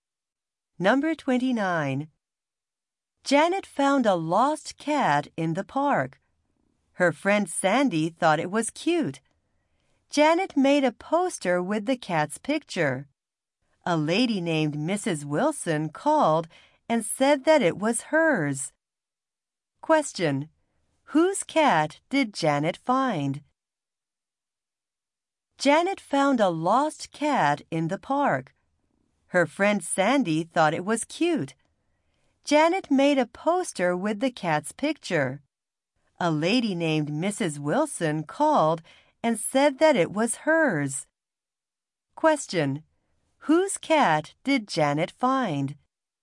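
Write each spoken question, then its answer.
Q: Whose cat did Janet find?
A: Mrs. Wilson's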